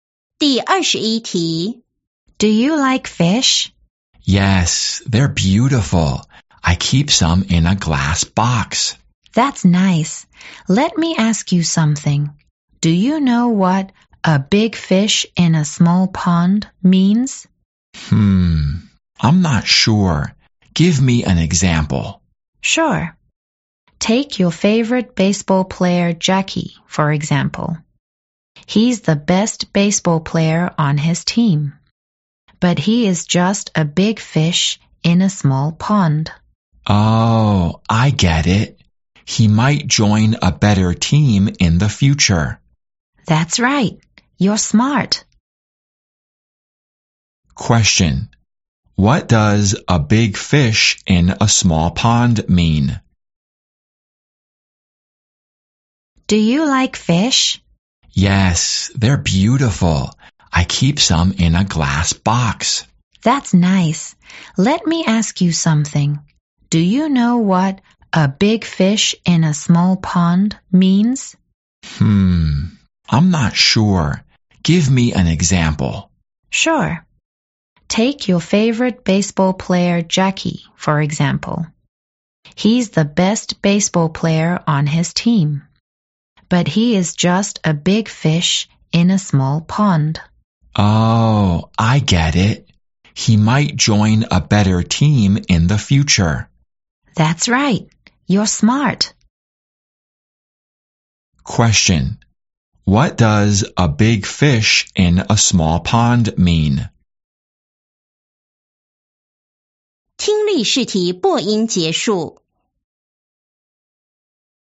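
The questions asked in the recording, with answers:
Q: What does a big fish in a small pond mean?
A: Someone who is the best in a small group but could do better somewhere bigger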